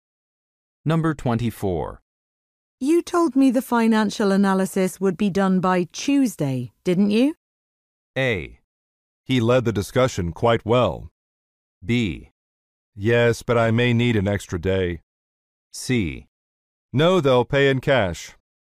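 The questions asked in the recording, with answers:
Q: You told me the financial analysis would be done by Tuesday, didn't you?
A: B: Yes, but I may need an extra day.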